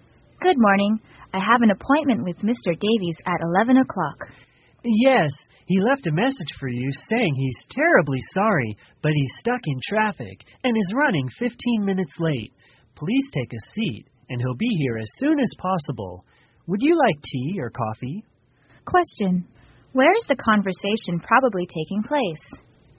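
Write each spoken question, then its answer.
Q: Where is the conversation probably taking place?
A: In an office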